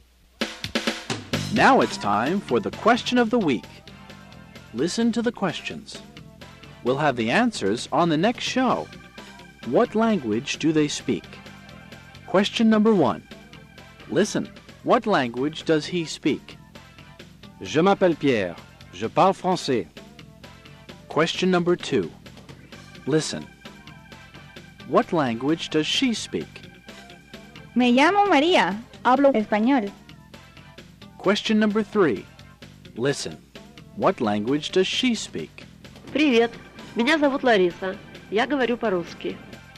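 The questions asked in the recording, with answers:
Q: what language does he speak?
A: French

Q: What language does she speak?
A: Spanish

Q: What language does she speak?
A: Russian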